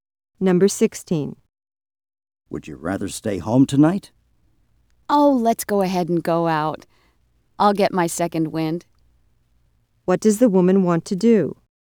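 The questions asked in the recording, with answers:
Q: What does the woman want to do?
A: Go out tonight.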